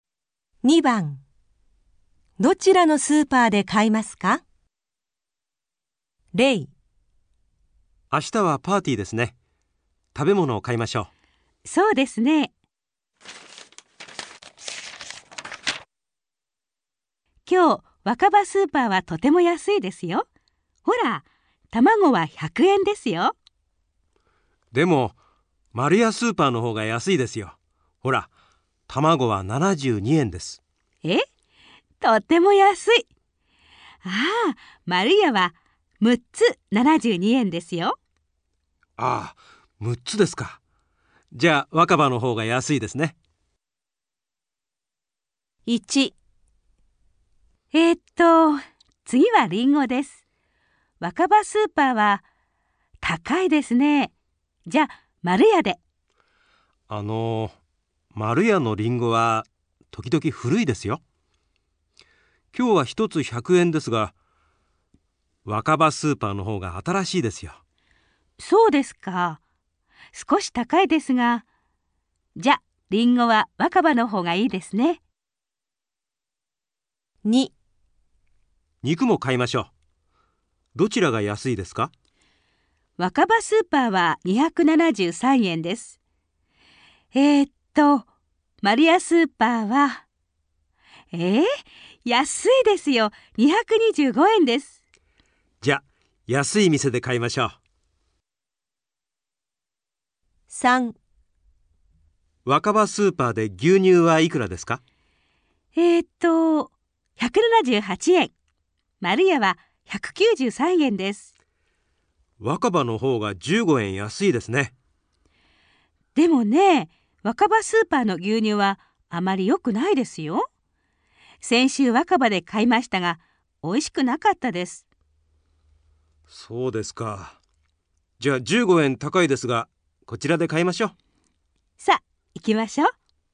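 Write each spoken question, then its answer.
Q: どちらのスーパーで買いますか?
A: 若葉スーパー(卵)

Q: どちらのスーパーで買いますか?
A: 若葉スーパー(リンゴ)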